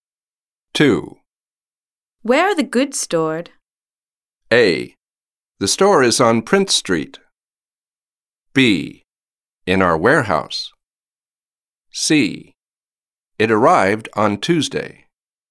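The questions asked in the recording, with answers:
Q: Where are the goods stored?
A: B: In our warehouse.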